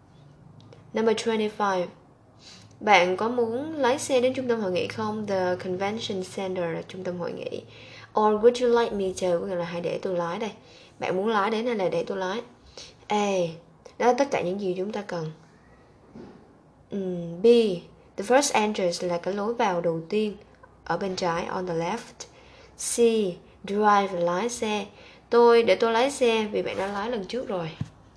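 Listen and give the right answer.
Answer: C: Để tôi lái xe vì bạn đã lái lần trước rồi.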